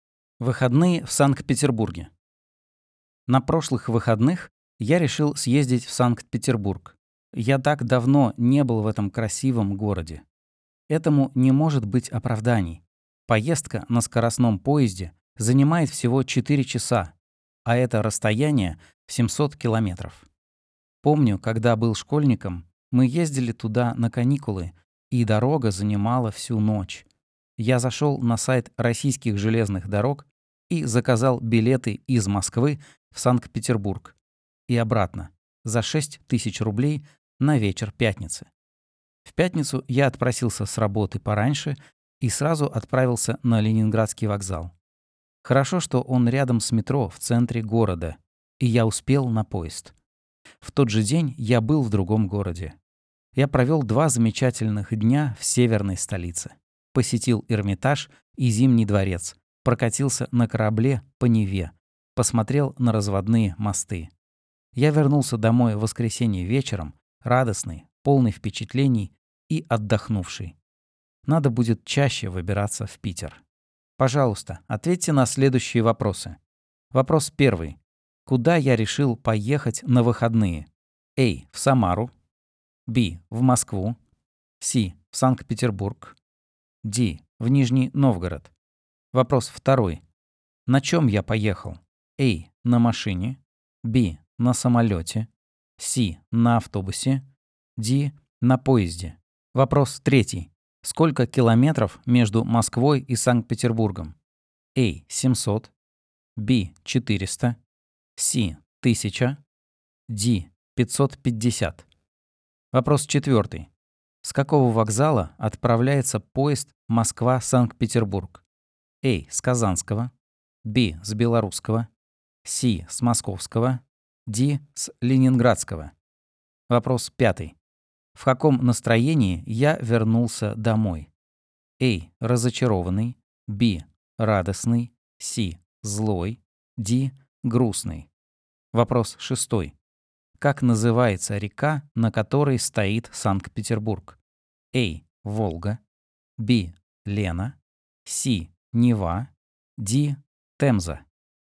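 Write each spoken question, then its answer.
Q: Куда я решил поехать на выходные?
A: С: В Санкт-Петербург

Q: На чем я поехал?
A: Д: На поезде

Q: Сколько километров между Москвой и Санкт-Петербургом?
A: А: 700

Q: С какого вокзала отправляется поезд Москва-Санкт-Петербург?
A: Д: С Ленинградского

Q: В каком настроении я вернулся домой?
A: Б: Радостный

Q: Как называется река, на которой стоит Санкт-Петербург?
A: С: Нева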